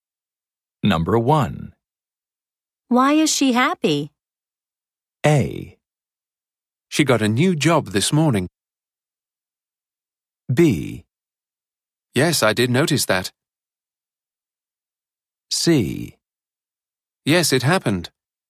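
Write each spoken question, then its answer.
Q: Why is she happy?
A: A: She got a new job this morning.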